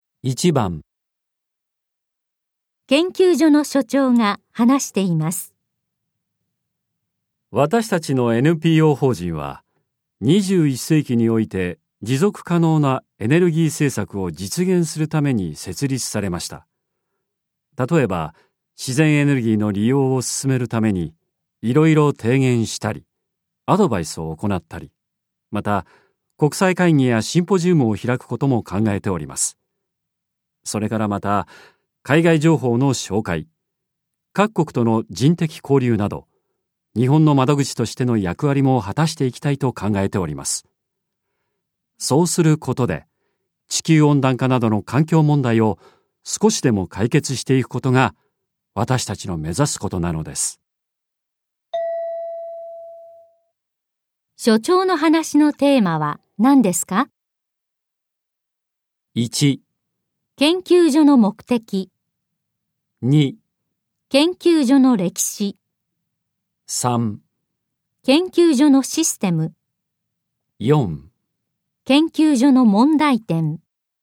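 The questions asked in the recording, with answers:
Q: 所長の話のテーマは何ですか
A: 1: 研究所の目的。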